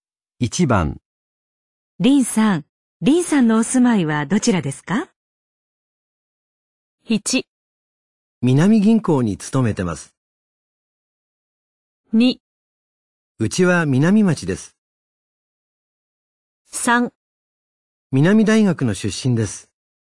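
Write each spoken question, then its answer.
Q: 林さん、林さんのお住まいはどちらですか?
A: 2: うちは南町です。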